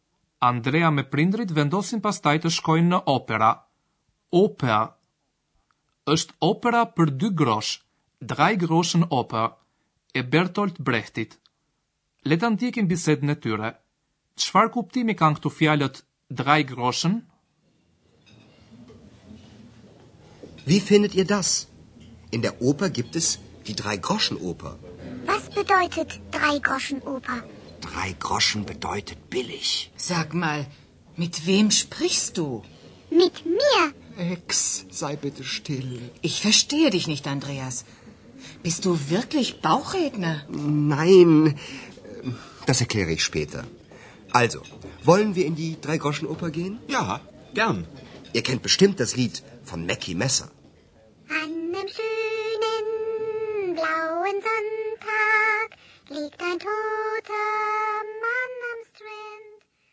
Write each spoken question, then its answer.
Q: Çfarë kuptimi kanë këtu fjalët Drei Groschen?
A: drej groshën ka kuptimin e lirë, badjava, ose dy grosh, në kuptimin kjo nuk bën dy grosh.